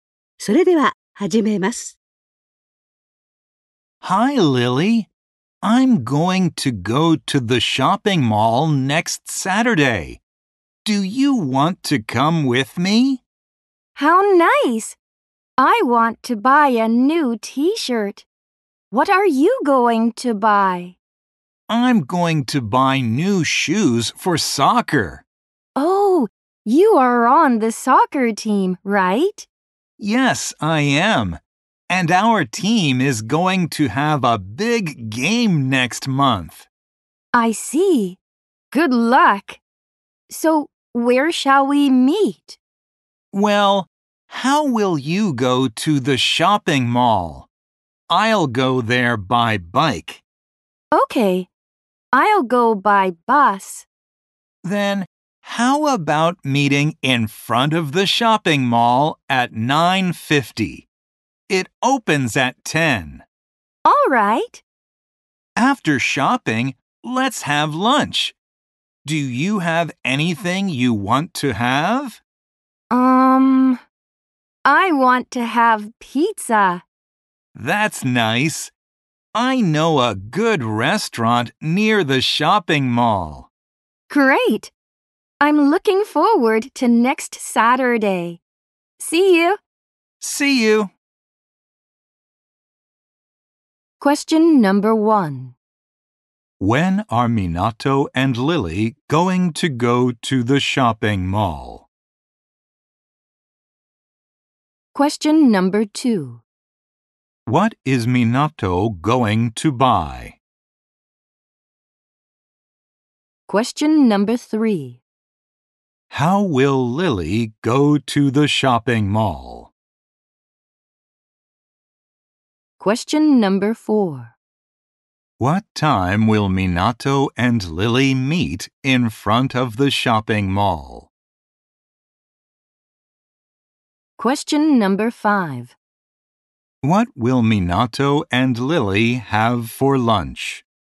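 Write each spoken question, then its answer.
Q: When are Minato and Lily going to go to the shopping mall?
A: Next Saturday

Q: What is Minato going to buy?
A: New shoes for soccer

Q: What time will Minato and Lily meet in front of the shopping mall?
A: At 9:50

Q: What will Minato and Lily have for lunch?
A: Pizza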